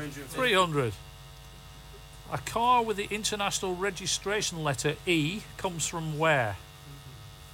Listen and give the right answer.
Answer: Comes from Spain, España.